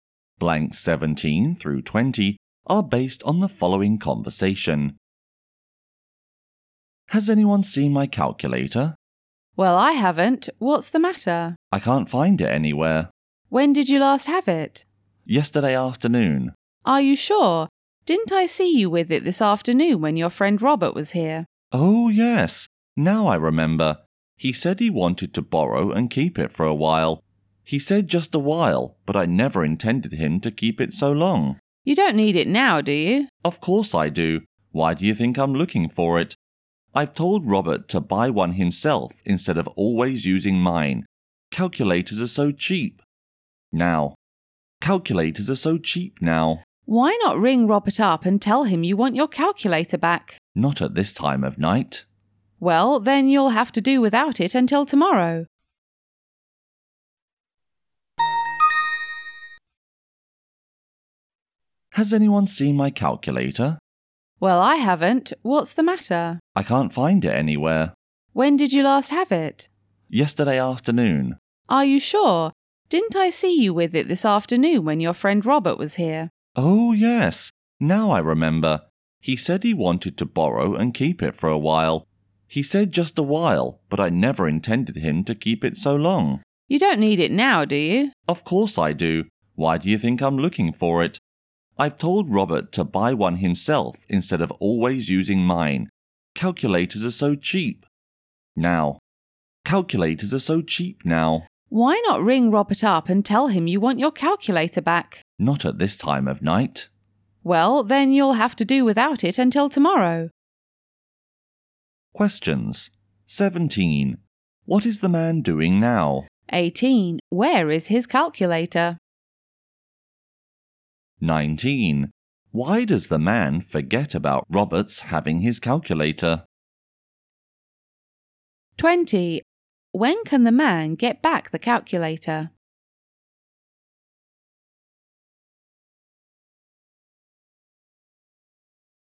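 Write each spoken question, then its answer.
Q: What is the man doing now?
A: Looking for his calculator

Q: Where is his calculator?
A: Robert has it

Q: When can the man get back the calculator?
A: Tomorrow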